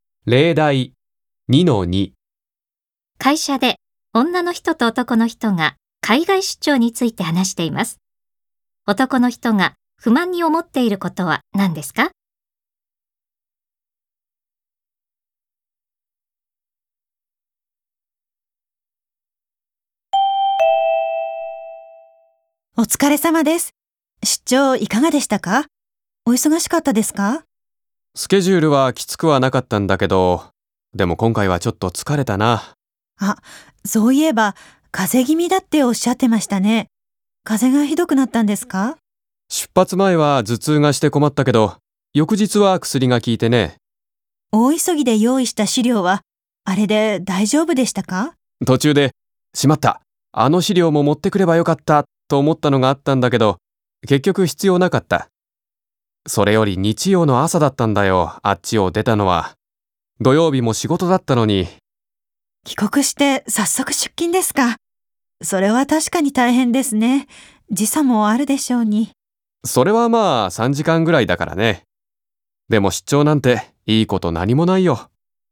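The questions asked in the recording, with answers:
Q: 男の人が不満に思っていることは何ですか?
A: 土曜日も仕事だったのに、日曜の朝に出張先を出なければならず、週末に休めなかったこと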